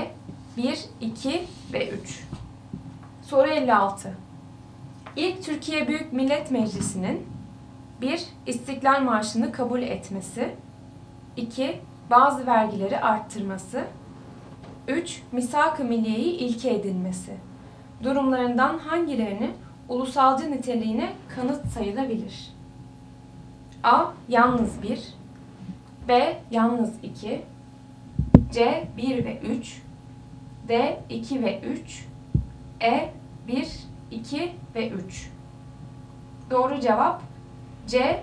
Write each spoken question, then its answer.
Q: Durumlarından hangilerini ulusalcı niteliğine kanıt sayılabilir?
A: Doğru cevap C. 1 ve 3.